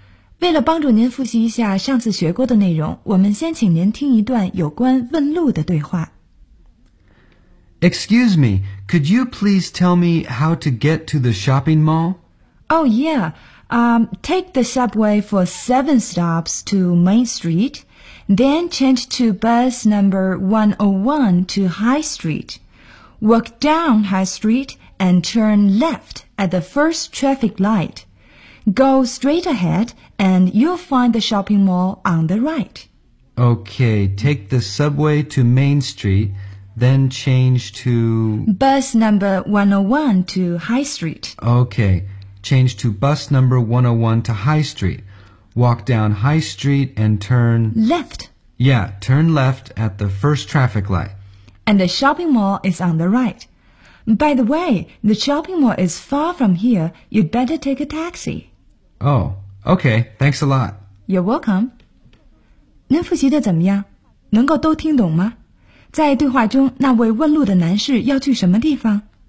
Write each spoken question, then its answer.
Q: 在对话中,那位问路的男士要去什么地方?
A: 他要去的是 shopping mall.